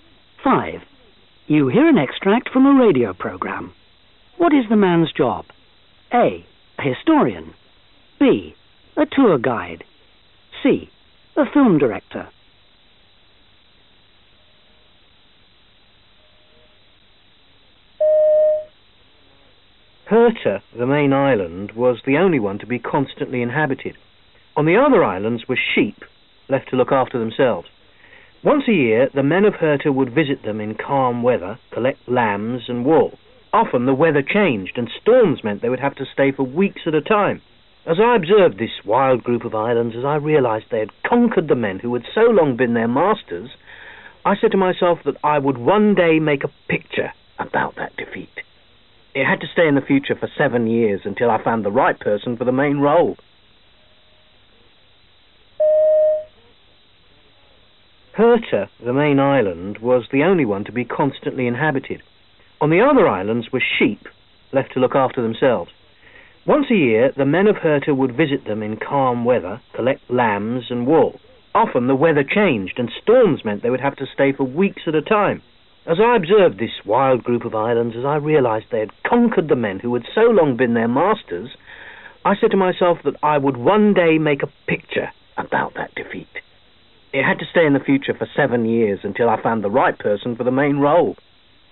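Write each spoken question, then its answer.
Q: What is the man's job? A. A historian. B. A tour guide. C. A film director.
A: C: A film director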